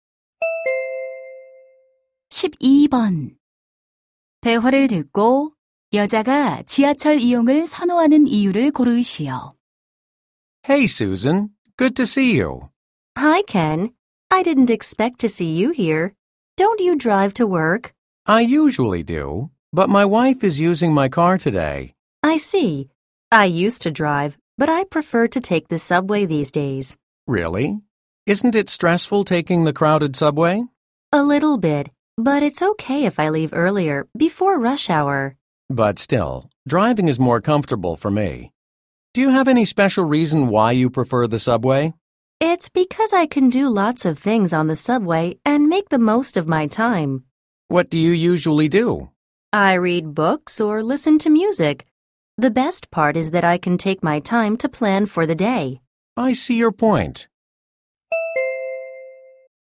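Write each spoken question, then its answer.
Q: 대화를 듣고 여자가 지하철 이용을 선호하는 이유를 고르시오.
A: 여러 가지 일을 하며 시간을 최대한 활용할 수 있어서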